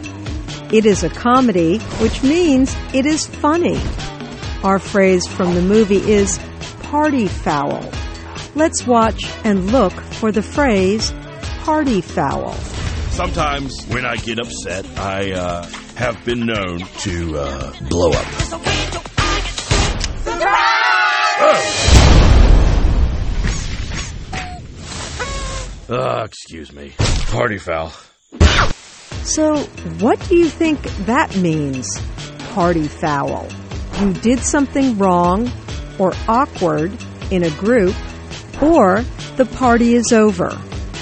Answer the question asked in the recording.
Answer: Party foul means you did something wrong or awkward in a group, usually at a party.